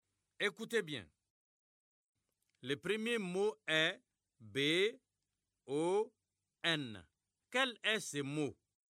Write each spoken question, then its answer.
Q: Quel est ce mot?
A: J'espère que vous avez trouvé bon.